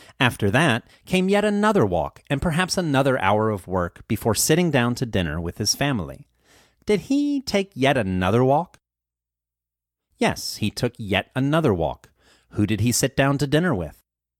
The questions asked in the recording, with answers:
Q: Who did he sit down to dinner with?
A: He sat down to dinner with his family.